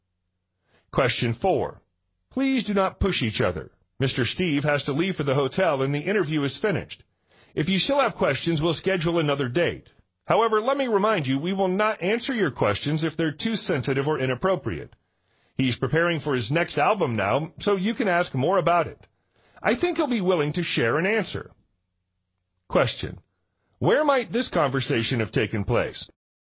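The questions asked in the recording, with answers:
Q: Where might this conversation have taken place?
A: At a press conference (an interview with a singer)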